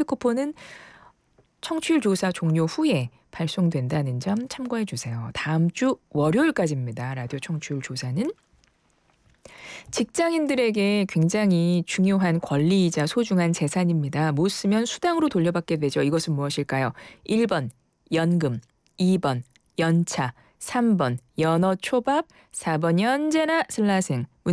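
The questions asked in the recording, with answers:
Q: 이것은 무엇일까요?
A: 2번: 연차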